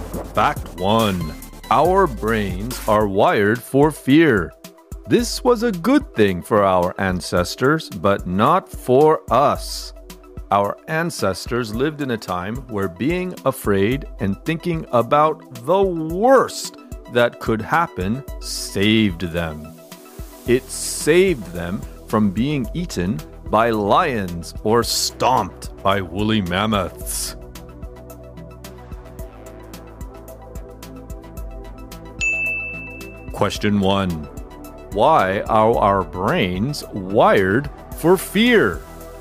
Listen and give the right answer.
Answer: Our brains are wired for fear because it was a good thing for our ancestors, but not for us.